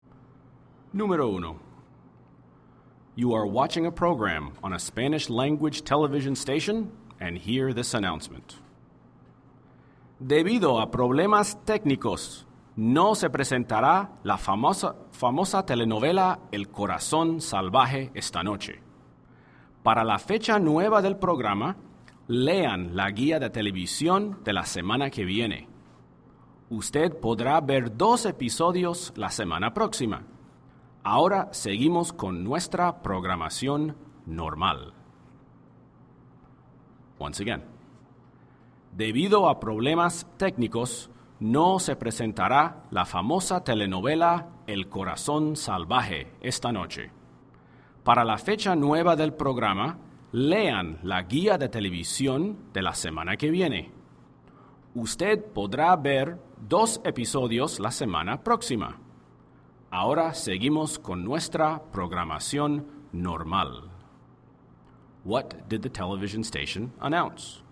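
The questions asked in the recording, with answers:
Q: What did the television station announce?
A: The soap opera El Corazón Salvaje will not be shown tonight because of technical problems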